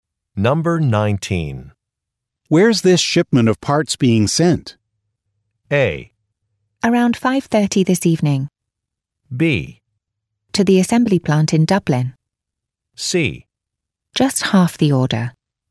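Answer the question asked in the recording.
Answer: B: To the assembly plant in Dublin.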